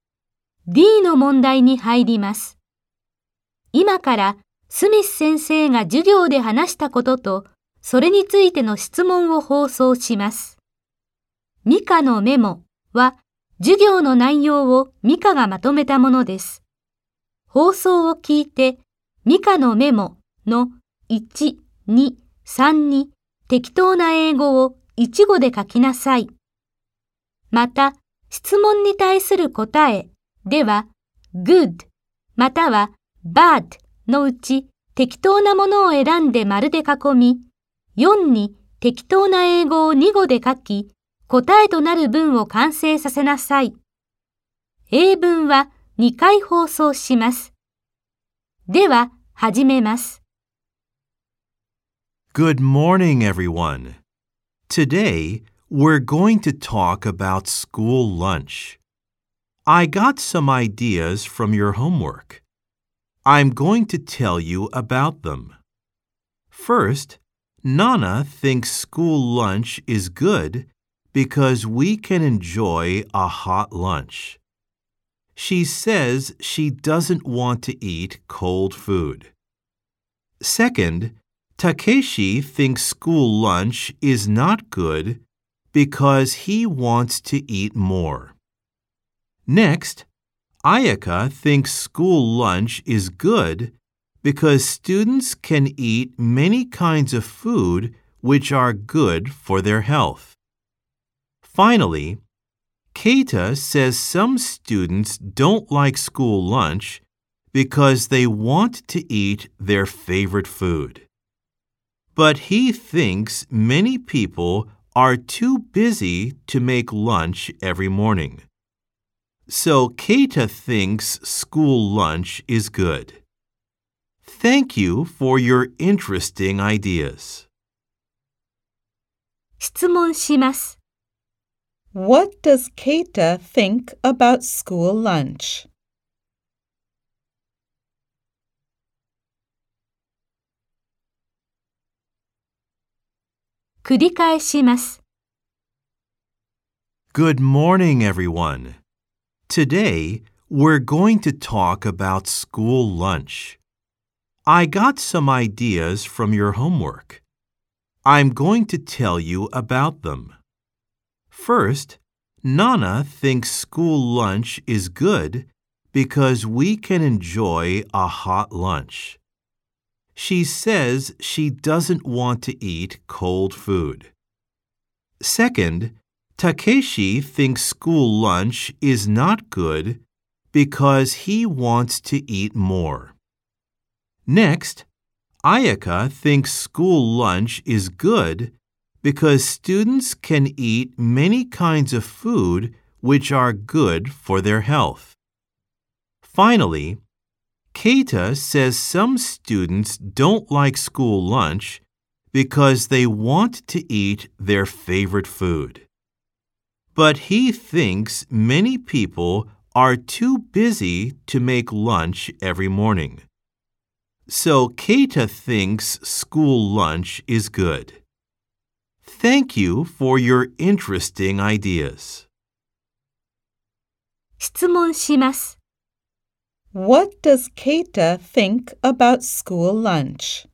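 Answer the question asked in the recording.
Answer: He thinks it is good because many people are too busy to make lunch every morning.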